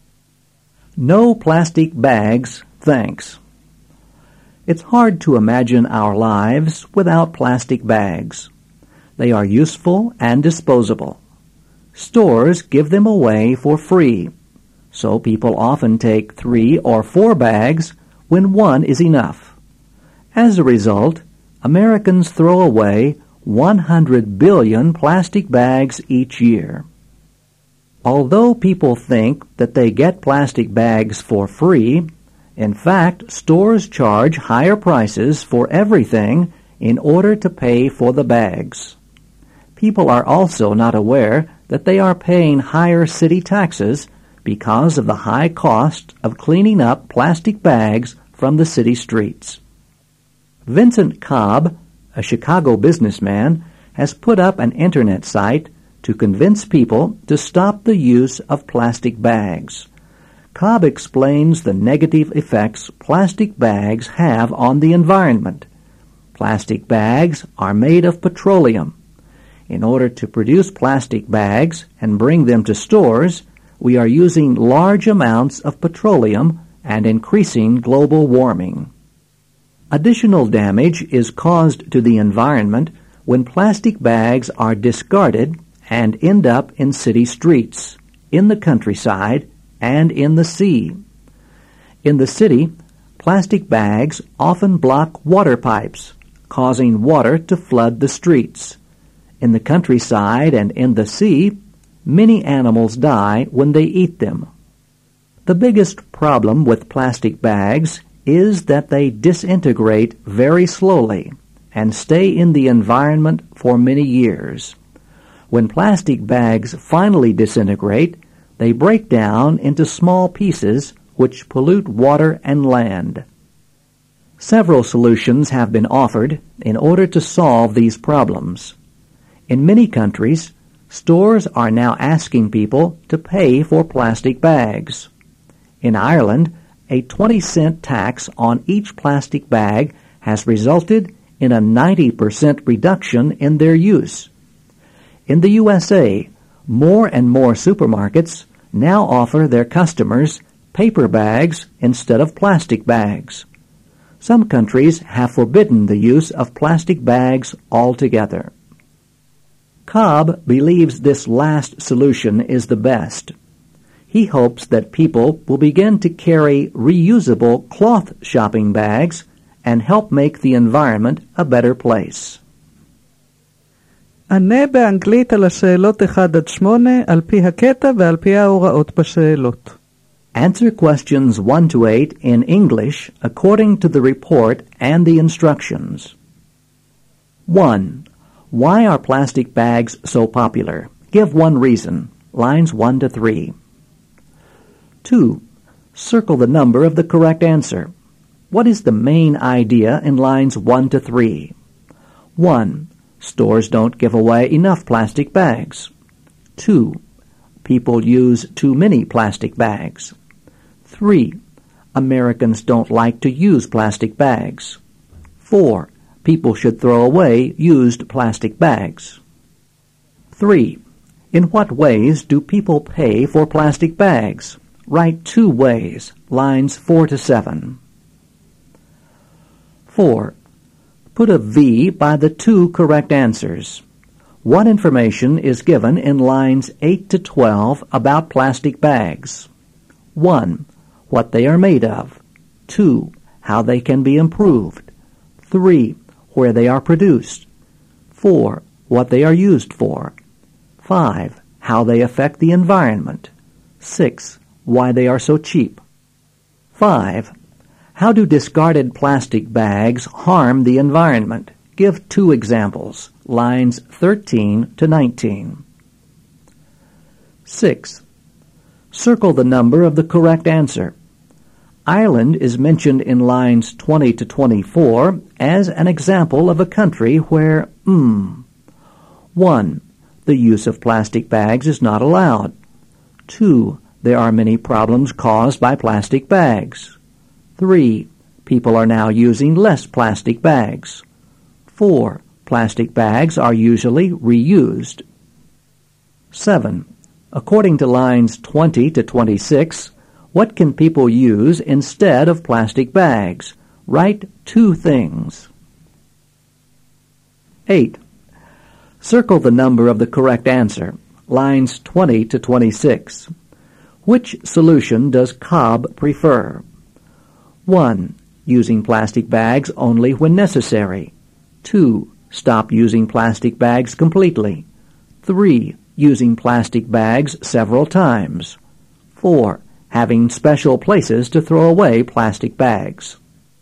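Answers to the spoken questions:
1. They are useful and disposable / stores give them away for free
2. 2: People use too many plastic bags.
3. Higher store prices and higher city taxes
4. 1: What they are made of; 5: How they affect the environment
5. They block water pipes causing floods; animals die when they eat them
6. 3: People are now using less plastic bags.
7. Paper bags and reusable cloth shopping bags
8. 2: Stop using plastic bags completely.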